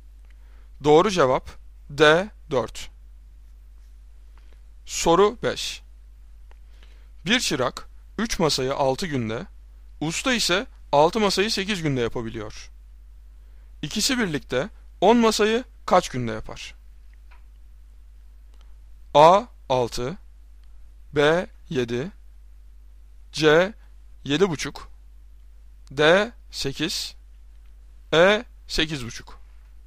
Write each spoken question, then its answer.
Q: İkisi birlikte 10 masayı kaç günde yapar?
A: Doğru cevap D 8.